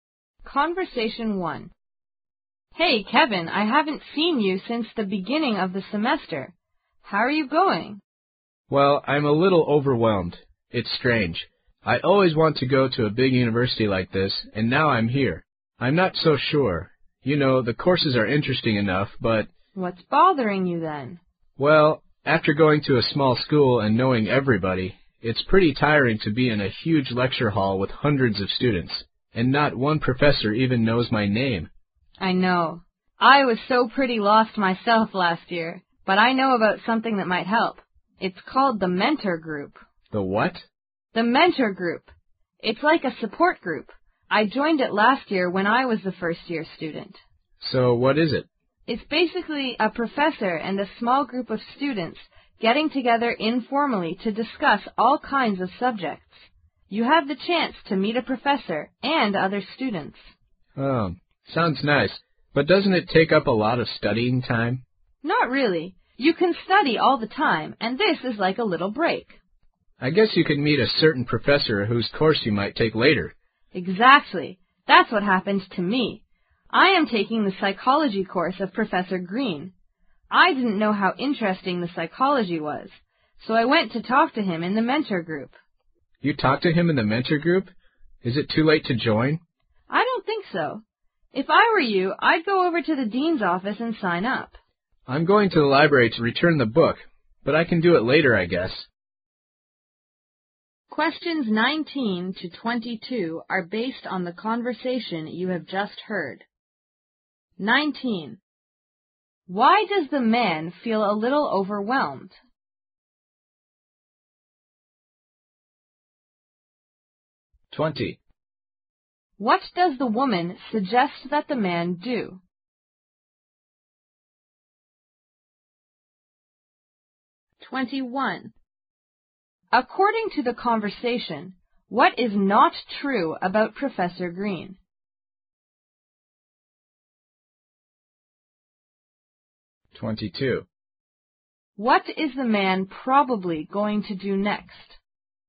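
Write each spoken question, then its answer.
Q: Why does the man feel a little overwhelmed?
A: He finds it tiring to be in huge lecture halls with hundreds of students, and no professor knows his name

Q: What does the woman suggest that the man do?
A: Join the mentor group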